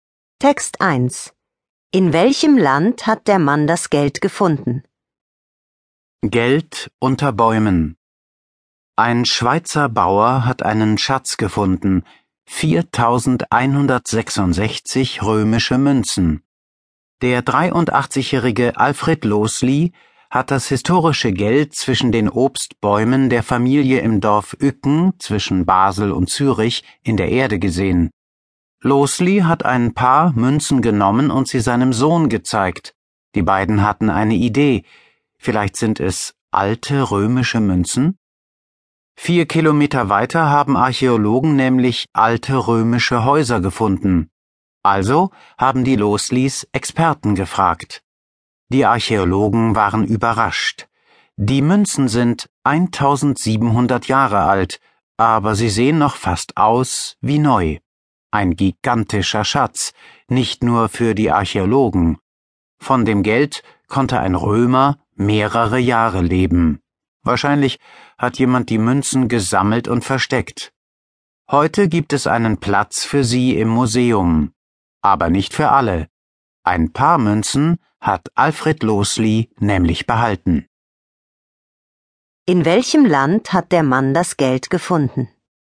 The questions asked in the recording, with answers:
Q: In welchem Land hat der Mann das Geld gefunden?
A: In der Schweiz.